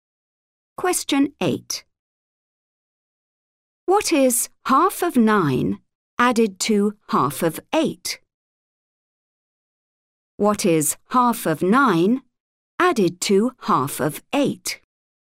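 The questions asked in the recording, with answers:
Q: What is 9 added to 8?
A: 17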